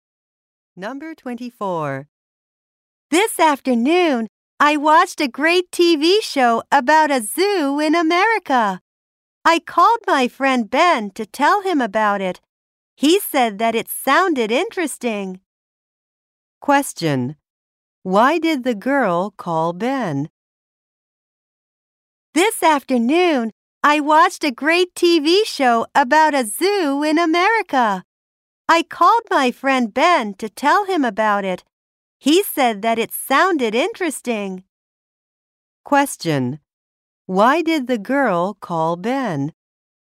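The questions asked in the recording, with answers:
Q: Why did the girl call Ben?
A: To tell him about a TV show.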